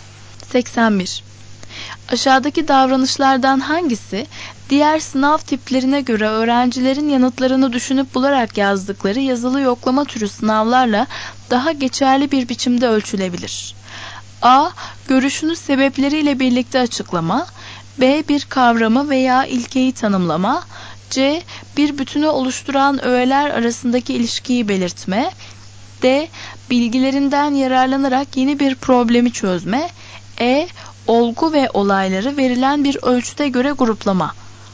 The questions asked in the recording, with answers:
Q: Aşağıdaki davranışlardan hangisi diğer sınav tiplerine göre öğrencilerin yanıtlarını düşünüp bularak yazdıkları yazılı yoklama türü sınavlarla daha geçerli bir biçimde ölçülebilir?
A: Doğru cevap A.